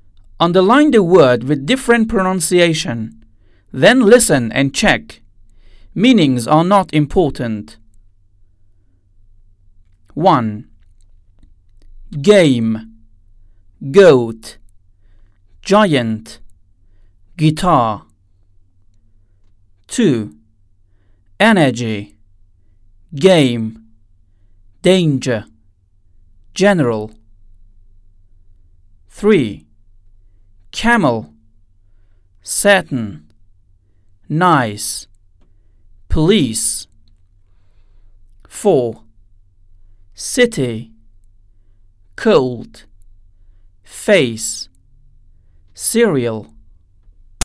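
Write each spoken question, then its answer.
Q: Game. Goat. Giant. Guitar.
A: Giant

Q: Energy. Game. Danger. General.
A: Game

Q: Camel. Satin. Nice. Police.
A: Camel

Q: City. Cold. Face. Cereal.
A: Cold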